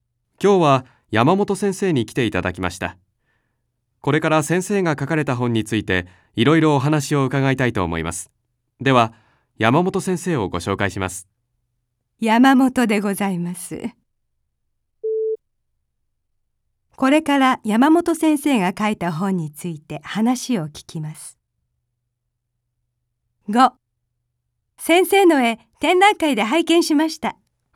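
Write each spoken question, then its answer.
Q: これから山本先生が書いた本について話を聞きます。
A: ○(正しい)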